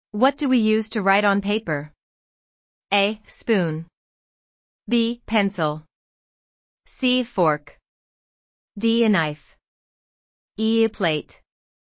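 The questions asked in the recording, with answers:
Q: What do we use to write on paper?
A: B: Pencil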